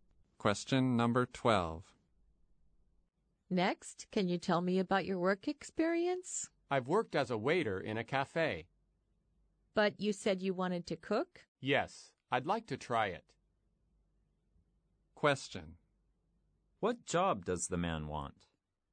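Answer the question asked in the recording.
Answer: Cook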